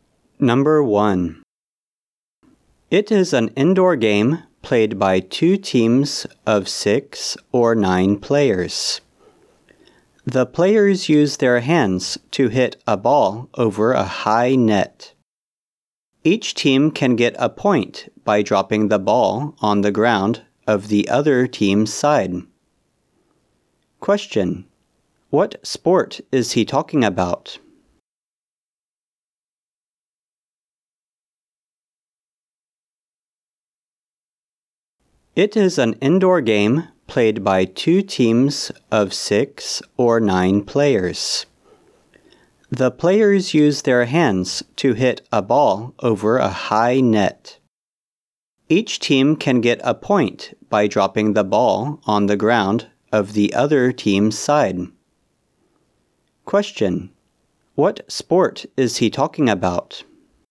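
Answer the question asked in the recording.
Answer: Volleyball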